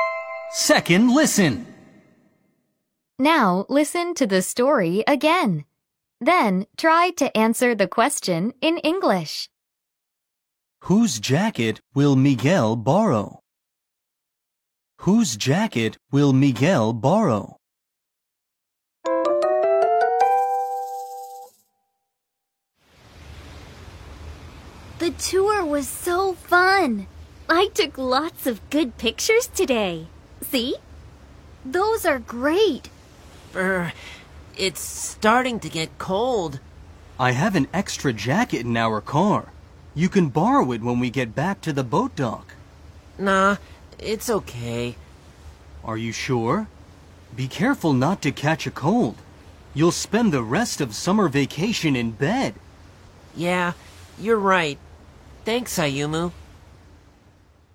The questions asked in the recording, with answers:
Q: Whose jacket will Miguel borrow?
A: The answer is Ayumu's jacket.